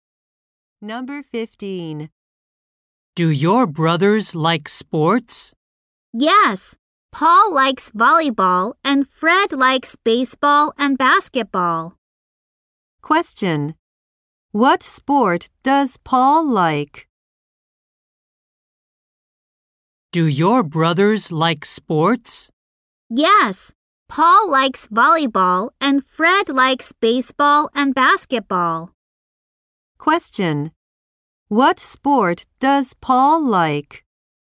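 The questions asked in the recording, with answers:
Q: What sport does Paul like?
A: Volleyball.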